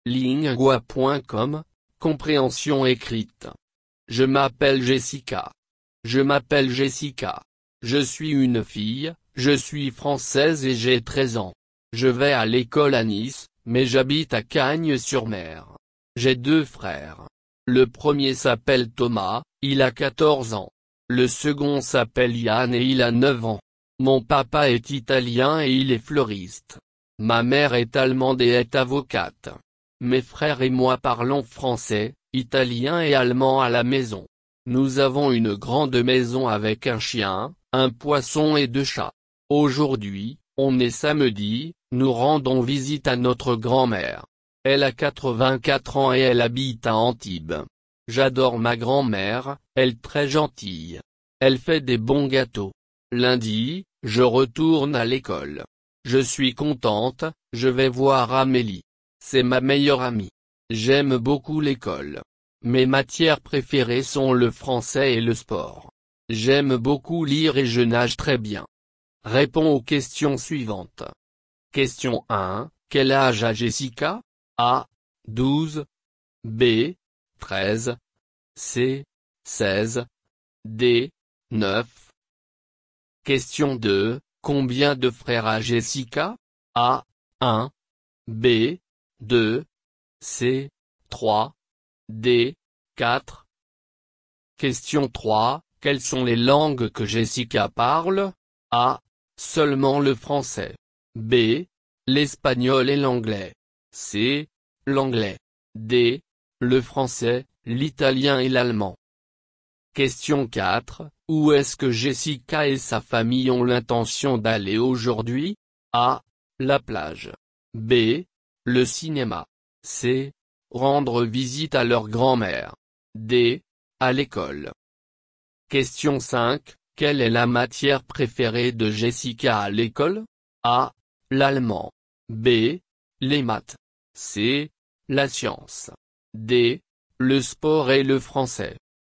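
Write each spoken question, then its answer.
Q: Quel âge a Jessica?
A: B: 13

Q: Combien de frères a Jessica?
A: B: 2

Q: Quelles sont les langues que Jessica parle?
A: D: Le français, l'italien et l'allemand

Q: Où est-ce que Jessica et sa famille ont l'intention d'aller aujourd'hui?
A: C: Rendre visite à leur grand-mère

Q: Quelle est la matière préférée de Jessica à l'école?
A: D: Le sport et le français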